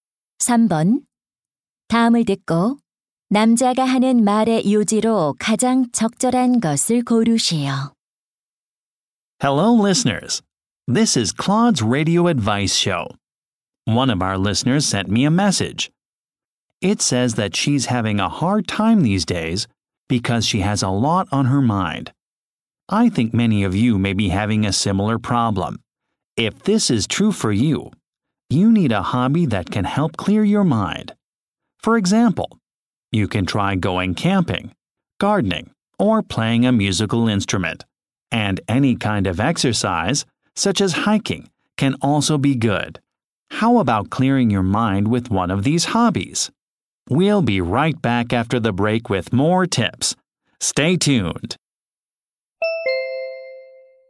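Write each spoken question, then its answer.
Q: 다음을 듣고 남자가 하는 말의 요지로 가장 적절한 것을 고르시오.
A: 취미 활동은 머리를 맑게 하는 데 도움이 된다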